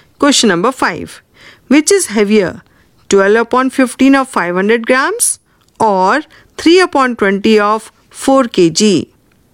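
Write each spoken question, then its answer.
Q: Which is heavier, 12 upon 15 of 500 grams or 3 upon 20 of 4 kg?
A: 3/20 of 4 kg (600 g vs 400 g)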